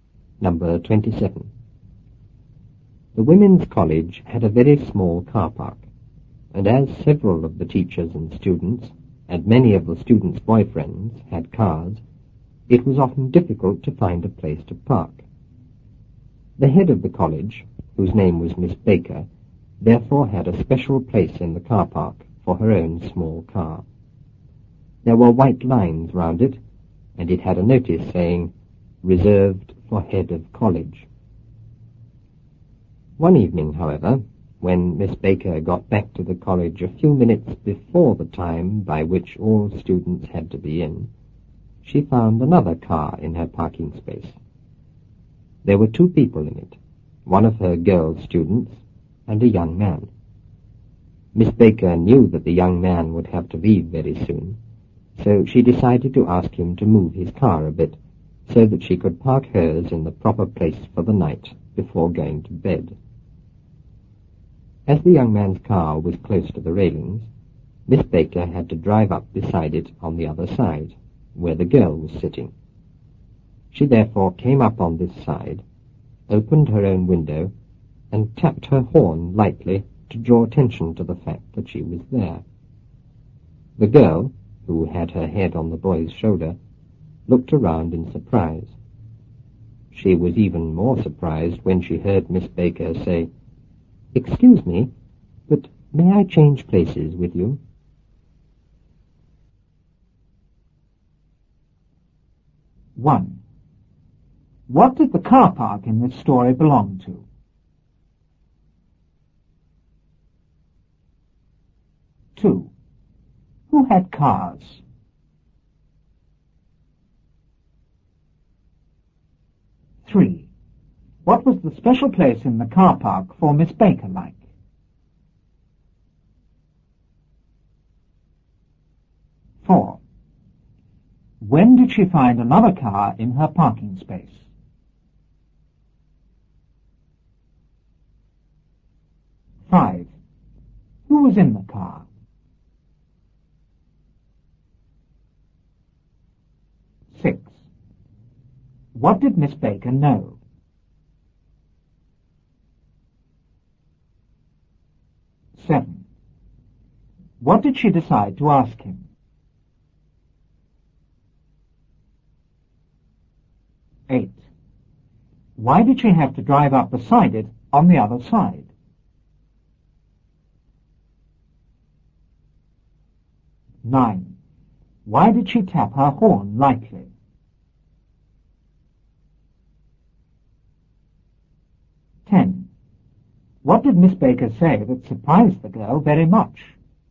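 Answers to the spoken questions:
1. The Women's College
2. Several of the teachers and students, and many of the students' boyfriends
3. It had white lines round it and a notice saying "Reserved for Head of College"
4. One evening, a few minutes before the time by which all students had to be in
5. One of her girl students and a young man
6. That the young man would have to leave very soon
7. To move his car a bit so she could park hers in the proper place
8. Because the young man's car was close to the railings
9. To draw attention to the fact that she was there
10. "Excuse me, but may I change places with you?"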